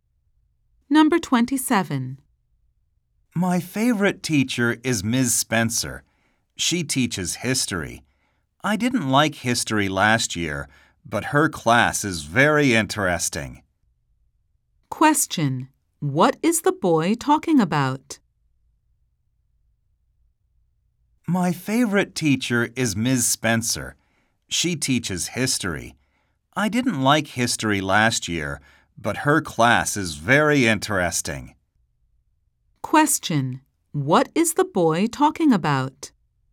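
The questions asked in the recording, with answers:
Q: What is the boy talking about?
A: His favorite teacher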